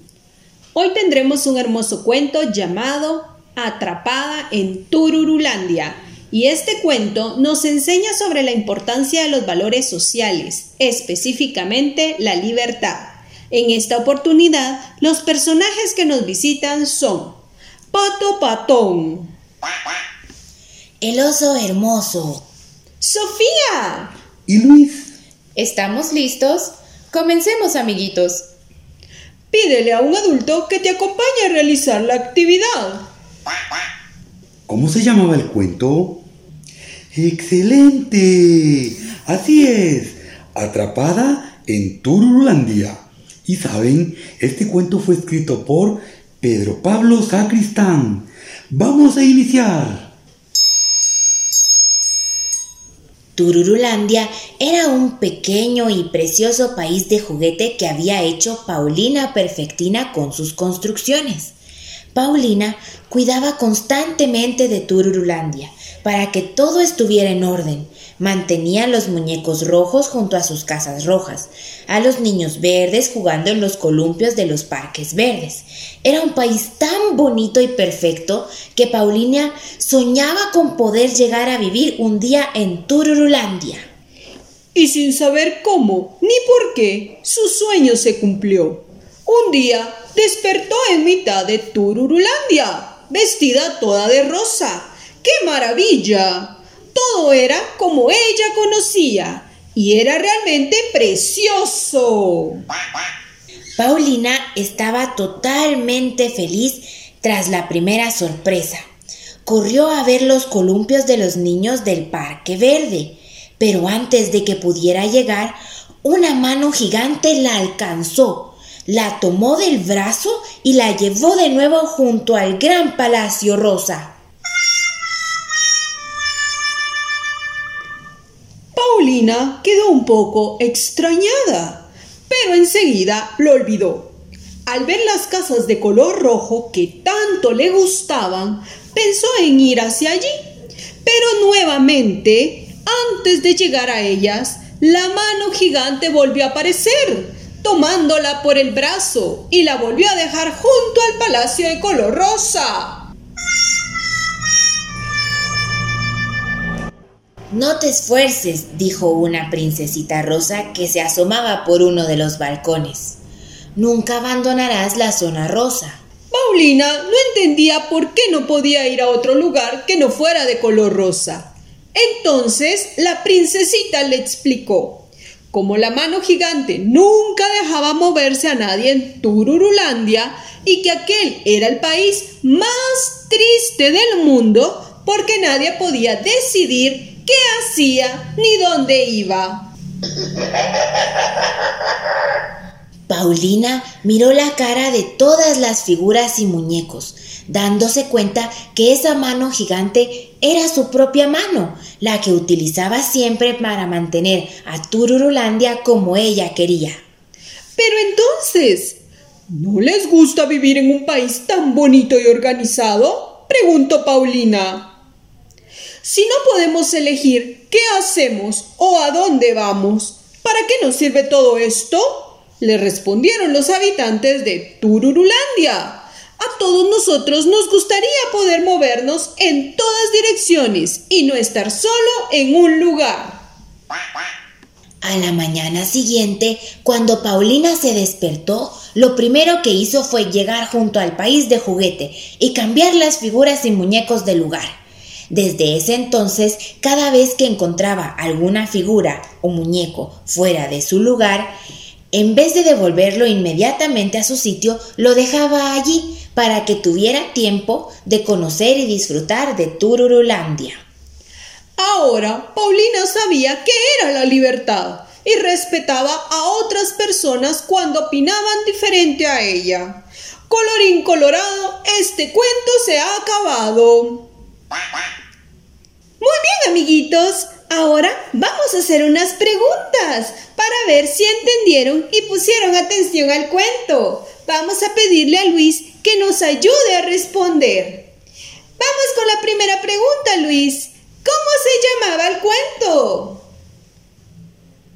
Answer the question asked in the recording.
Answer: ¡Excelente! Atrapada en Turulandia.